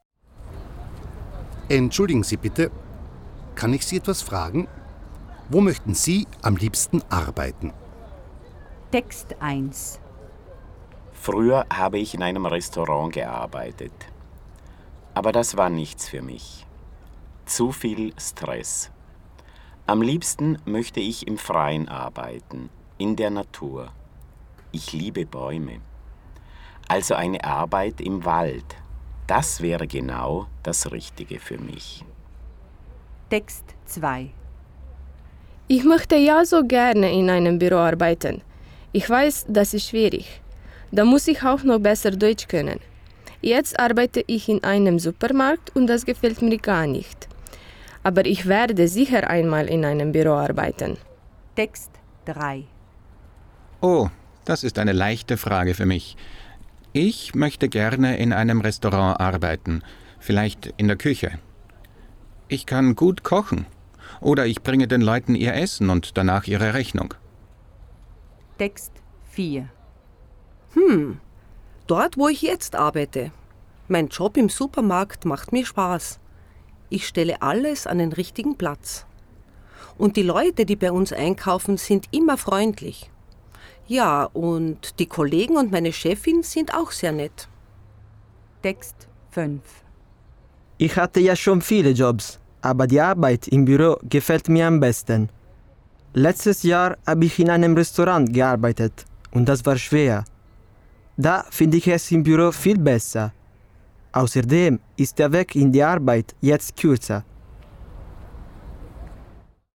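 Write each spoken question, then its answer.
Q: Wo möchten Sie am liebsten arbeiten?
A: Im Wald, in der Natur

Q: Wo möchten Sie am liebsten arbeiten?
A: In einem Büro

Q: Wo möchten Sie am liebsten arbeiten?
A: In einem Restaurant

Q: Wo möchten Sie am liebsten arbeiten?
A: Im Supermarkt

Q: Wo möchten Sie am liebsten arbeiten?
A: Im Büro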